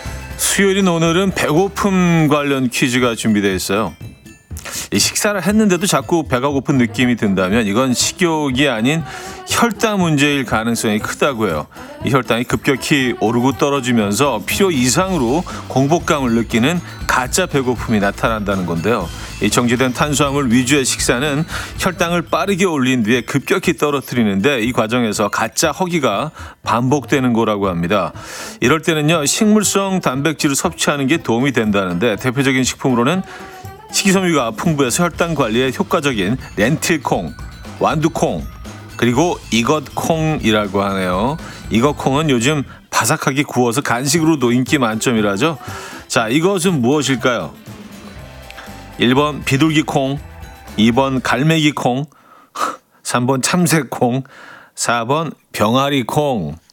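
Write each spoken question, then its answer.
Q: 자, 이것은 무엇일까요? 1번 비둘기콩, 2번 갈매기콩, 3번 참새콩, 4번 병아리콩.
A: 4: 병아리콩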